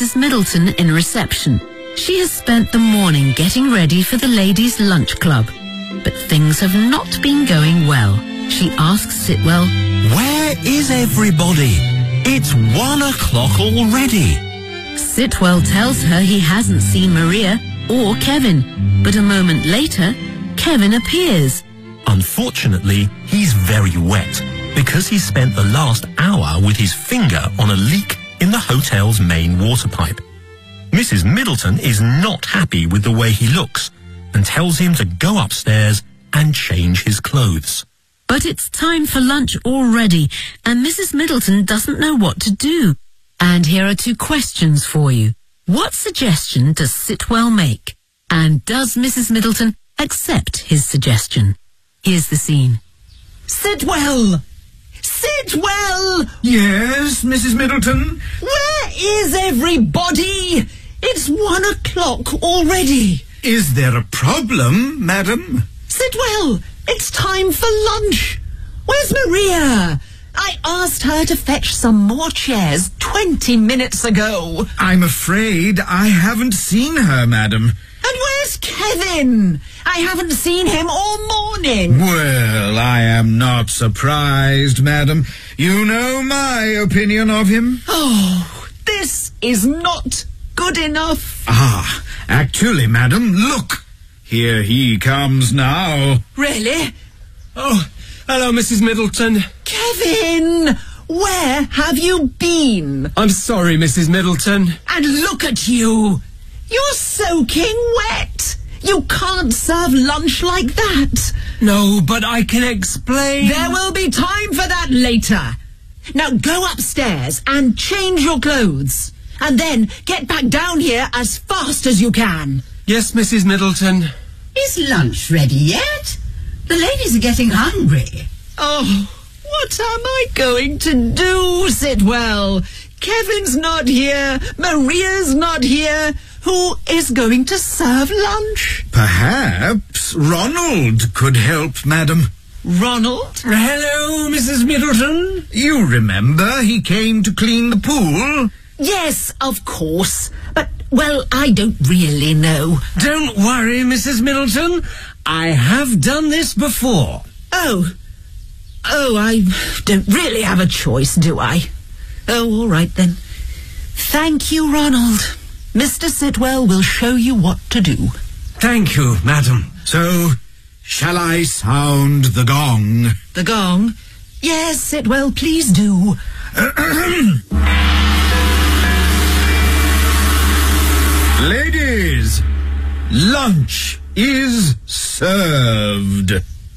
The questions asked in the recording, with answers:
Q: What suggestion does Sitwell make?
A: Perhaps Ronald could help, madam.

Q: And does Mrs. Middleton accept his suggestion?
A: Yes, she says...